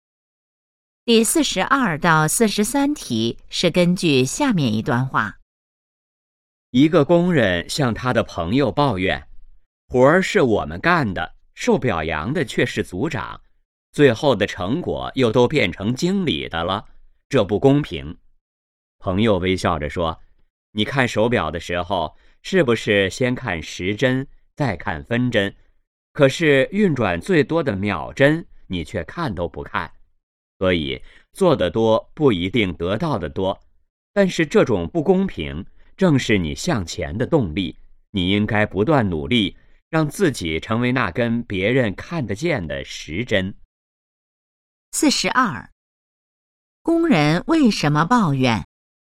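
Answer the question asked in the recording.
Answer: 活儿是工人干的,受表扬的却是组长,成果又变成经理的,他觉得不公平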